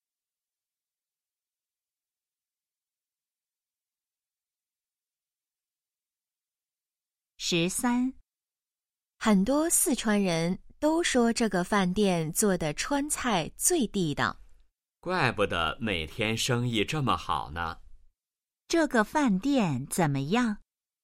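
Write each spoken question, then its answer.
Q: 这个饭店怎么样?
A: 川菜很地道,生意很好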